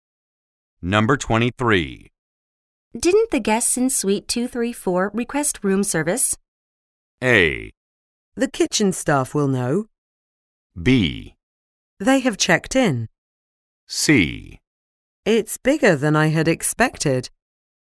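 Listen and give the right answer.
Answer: A: The kitchen staff will know.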